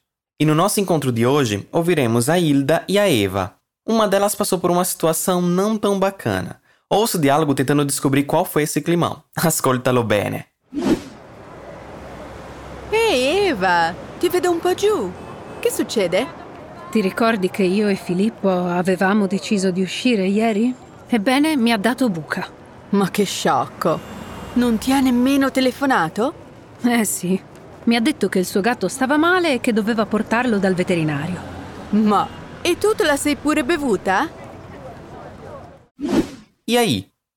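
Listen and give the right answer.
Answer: Porque o Filippo deu bolo nela (não apareceu no encontro)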